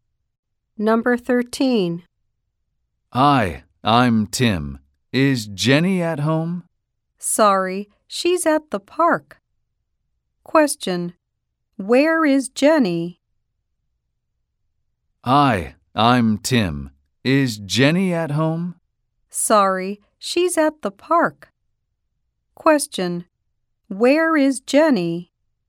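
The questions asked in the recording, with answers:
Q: Where is Jenny?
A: At the park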